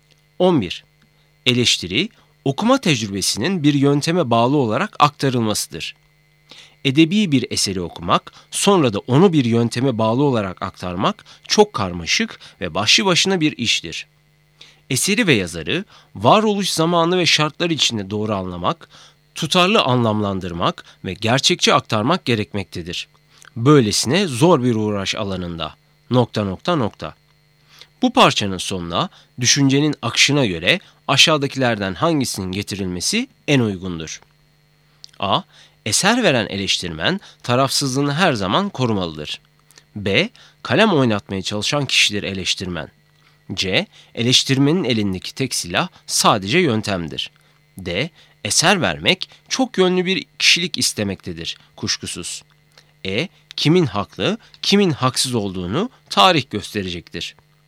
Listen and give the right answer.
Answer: Doğru cevap C. Eleştirmenin elindeki tek silah sadece yöntemdir.